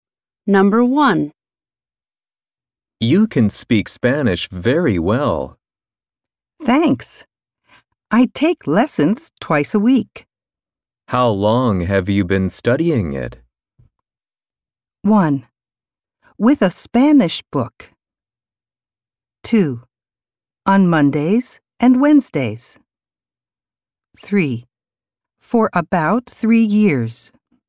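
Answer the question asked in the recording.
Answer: 3: For about three years.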